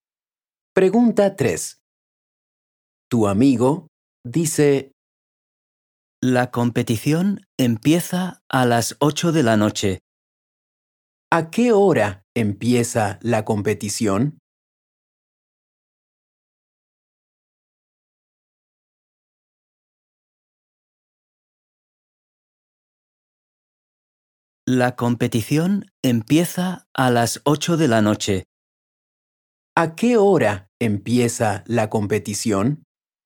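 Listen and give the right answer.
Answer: A las 8 de la noche.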